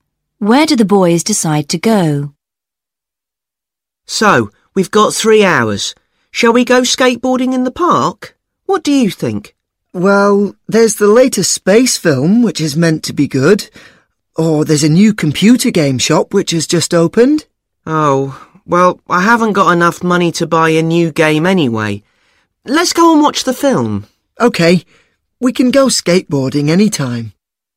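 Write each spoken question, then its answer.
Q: Where do the boys decide to go?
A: To the cinema to watch the space film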